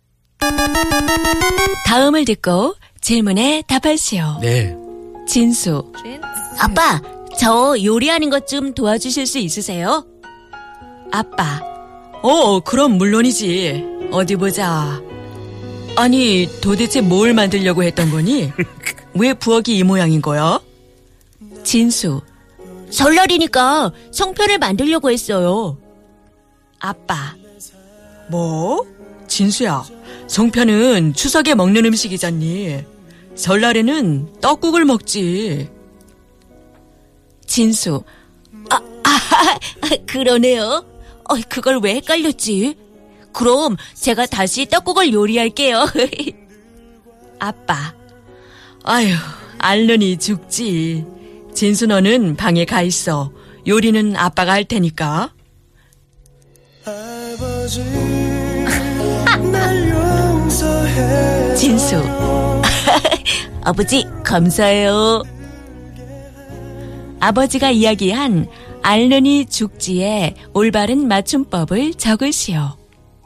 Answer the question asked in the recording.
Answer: Ying A Lir Hit Ni Chukji